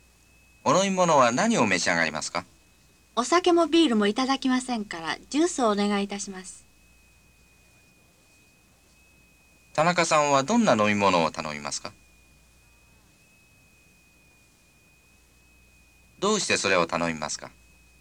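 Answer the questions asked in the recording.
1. ジュース
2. お酒もビールも飲まないから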